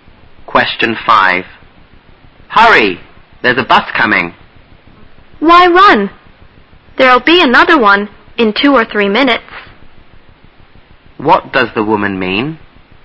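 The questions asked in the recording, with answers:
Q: What does the woman mean?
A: There's no need to hurry; another bus will come in 2 or 3 minutes.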